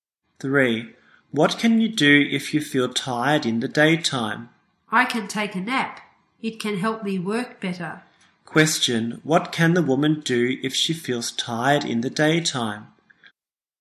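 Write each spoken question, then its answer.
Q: Question: What can the woman do if she feels tired in the daytime?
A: Take a nap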